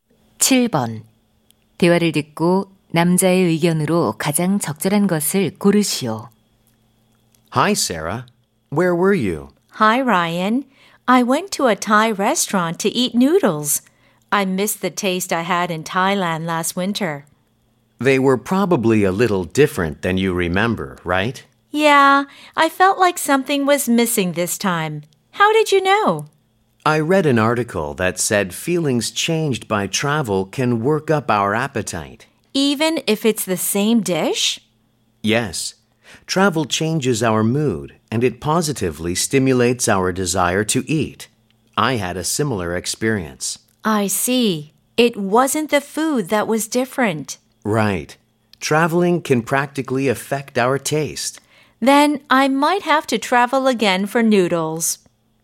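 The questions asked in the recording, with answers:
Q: 대화를 듣고 남자의 의견으로 가장 적절한 것을 고르시오.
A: 여행이 음식 맛에 영향을 줄 수 있다.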